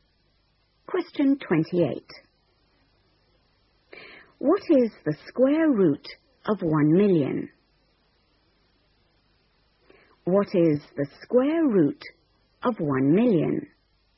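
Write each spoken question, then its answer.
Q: What is the square root of 1,000,000?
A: 1000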